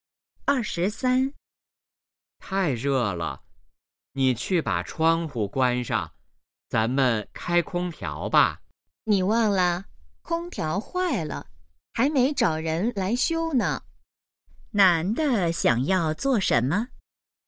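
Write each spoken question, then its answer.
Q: 男的想要做什么?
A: 开空调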